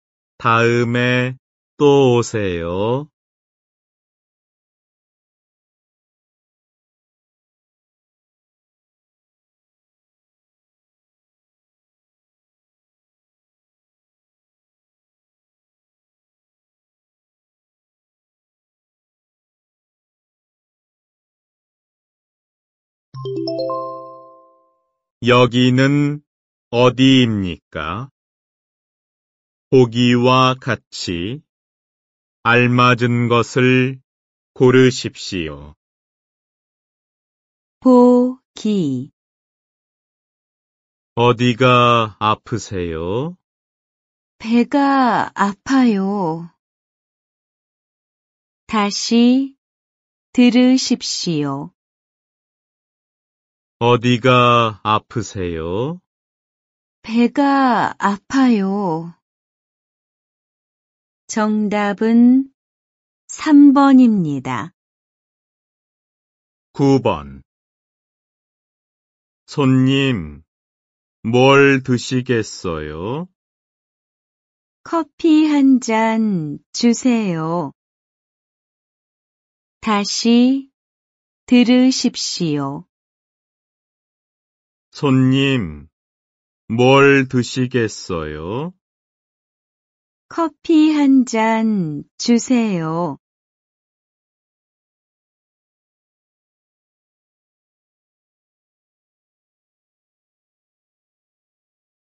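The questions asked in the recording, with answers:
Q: 여기는 어디입니까?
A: 카페(커피숍)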